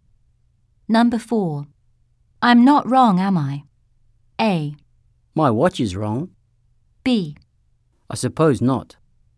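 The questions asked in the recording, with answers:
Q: I'm not wrong, am I?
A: B: I suppose not.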